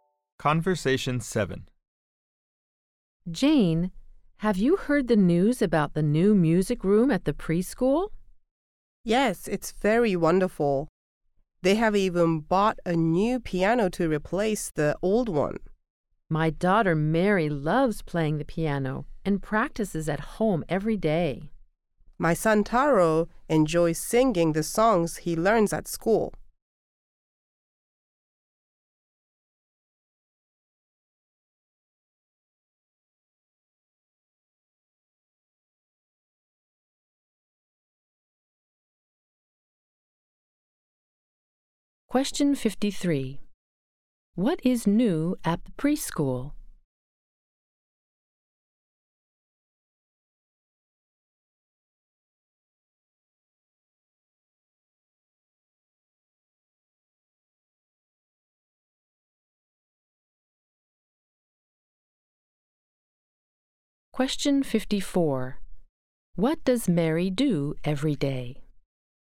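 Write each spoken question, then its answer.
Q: What is new at the preschool?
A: A music room and a new piano

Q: What does Mary do every day?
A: She practices the piano at home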